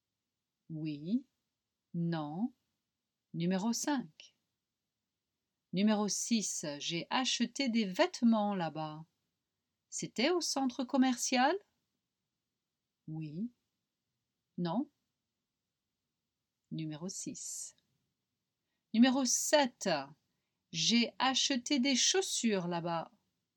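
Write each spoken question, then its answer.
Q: C'était au centre commercial?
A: Oui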